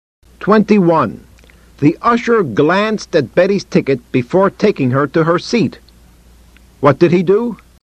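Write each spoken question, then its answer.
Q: What did he do?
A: He glanced at Betty's ticket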